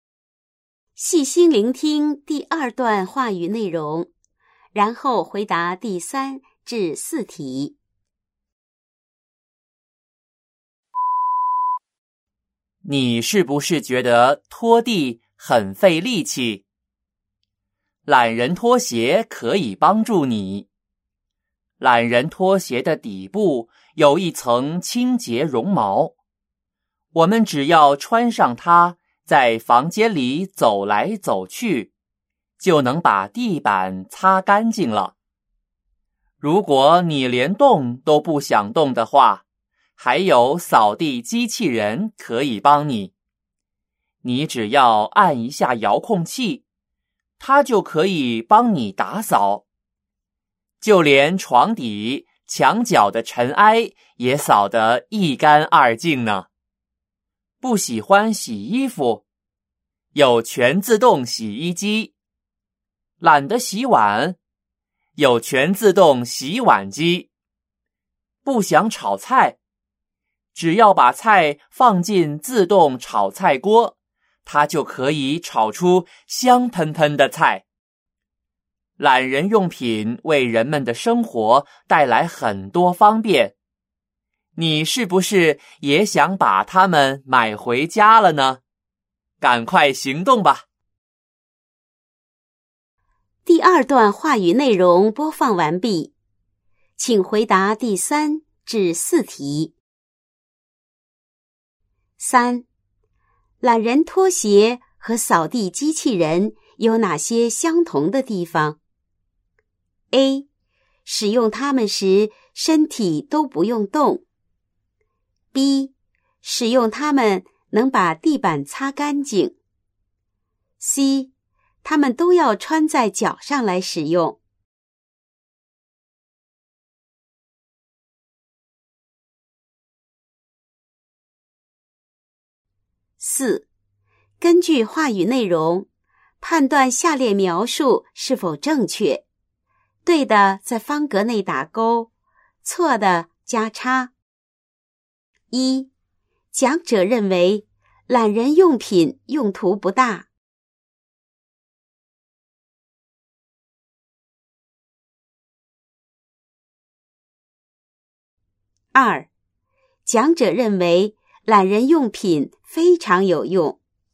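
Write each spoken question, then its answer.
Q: 懒人拖鞋和扫地机器人有哪些相同的地方?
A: B: 使用它们能把地板擦干净。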